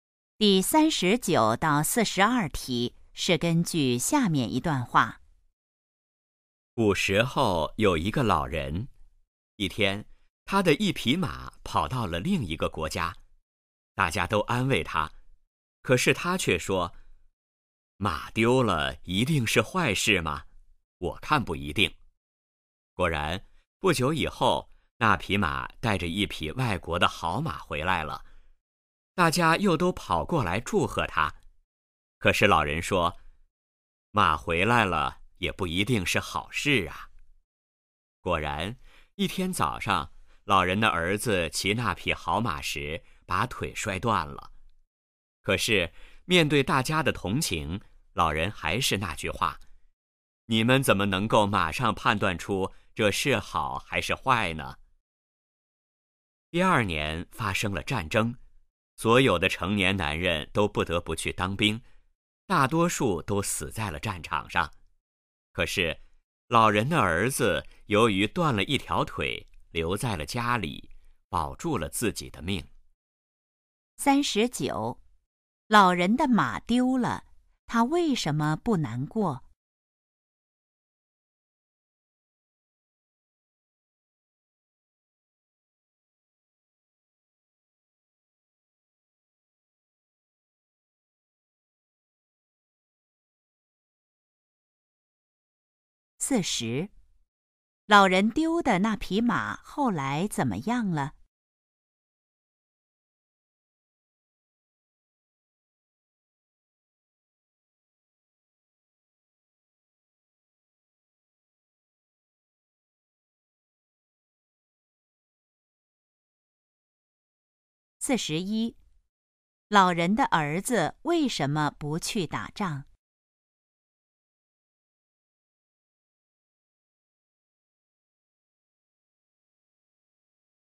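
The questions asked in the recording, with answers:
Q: 老人丢的那匹马后来怎么样了?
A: 带着一匹外国的好马回来了

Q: 老人的儿子为什么不去打仗?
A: 他断了一条腿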